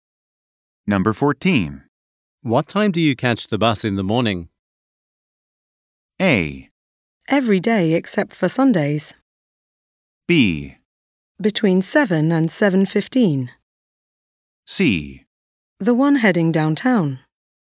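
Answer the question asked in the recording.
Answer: B: Between 7 and 7:15.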